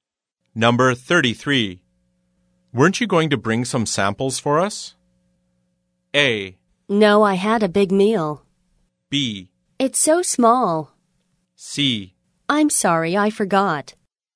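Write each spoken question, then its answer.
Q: Weren't you going to bring some samples for us?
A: C: I'm sorry, I forgot.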